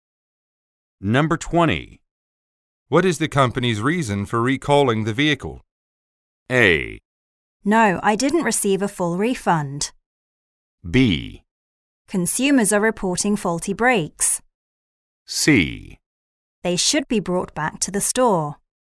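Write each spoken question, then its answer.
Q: What is the company's reason for recalling the vehicle?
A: B: Consumers are reporting faulty brakes.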